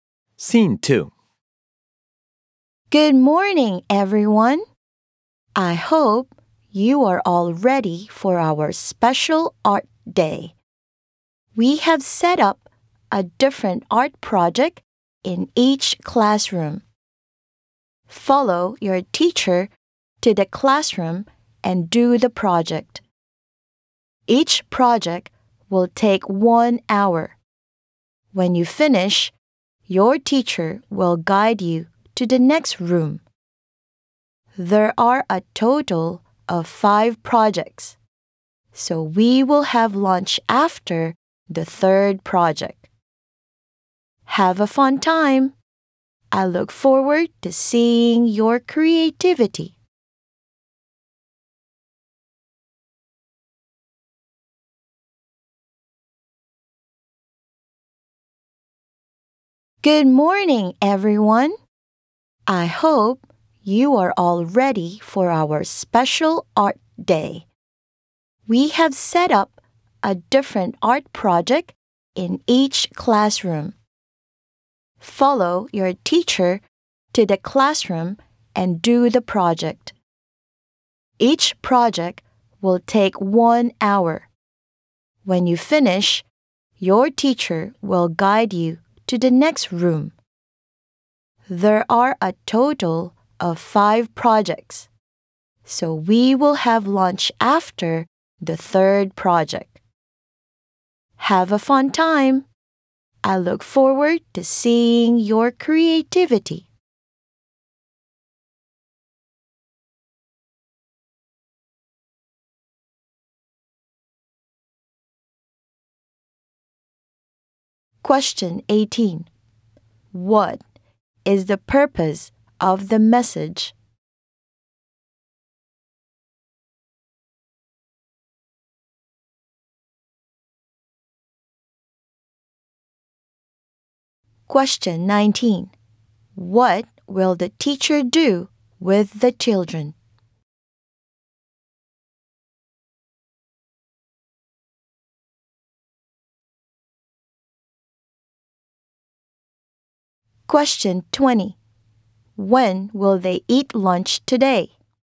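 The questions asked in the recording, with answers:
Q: What is the purpose of the message?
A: To explain the plan for the special art day

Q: When will they eat lunch today?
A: After the third project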